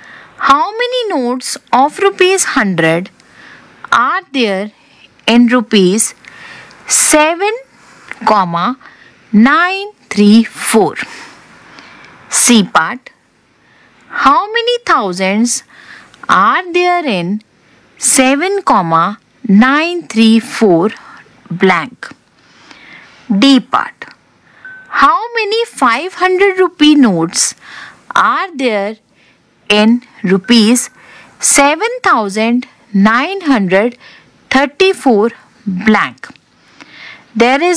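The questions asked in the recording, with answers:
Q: How many notes of rupees 100 are there in rupees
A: 79

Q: How many 500 rupee notes are there in rupees 7,934 blank?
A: 15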